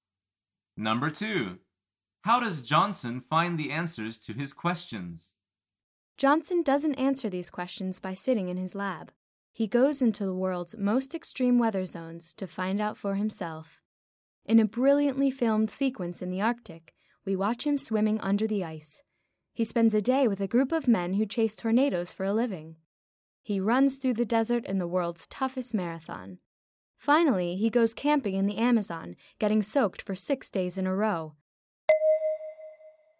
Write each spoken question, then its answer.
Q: How does Johnson find the answers to his questions?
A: The answer is he goes to the extreme weather zones himself.